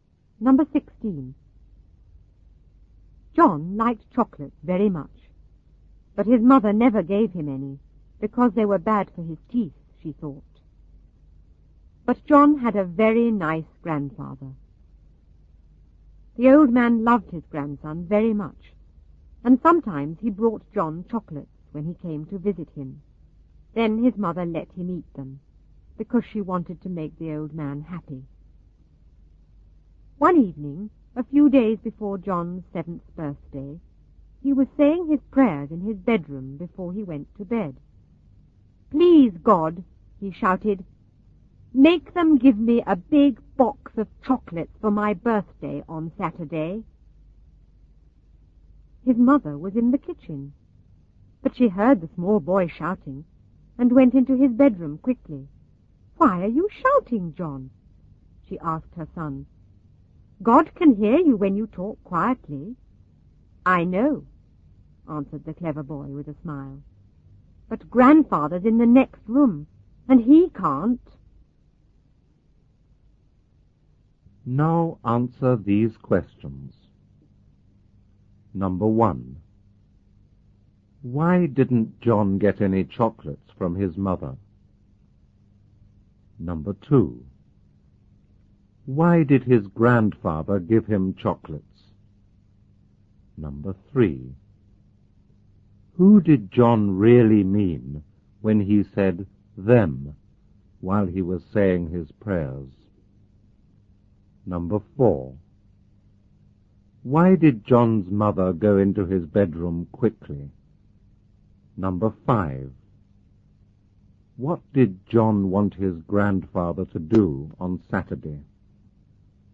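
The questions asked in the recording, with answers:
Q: Why didn't John get any chocolates from his mother?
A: She thought they were bad for his teeth.

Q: Why did his grandfather give him chocolates?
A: Because he loved his grandson very much.

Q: Who did John really mean when he said them while he was saying his prayers?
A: His grandfather (and his mother).

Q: Why did John's mother go into his bedroom quickly?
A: Because she heard him shouting.

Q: What did John want his grandfather to do on Saturday?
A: Give him a big box of chocolates for his birthday.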